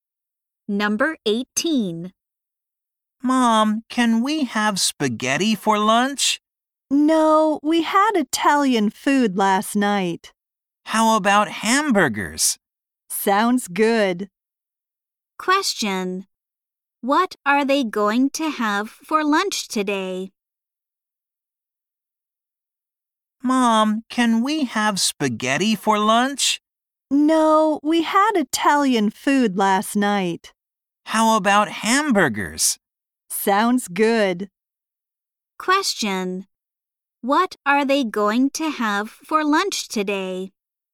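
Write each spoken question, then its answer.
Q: What are they going to have for lunch today?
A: Hamburgers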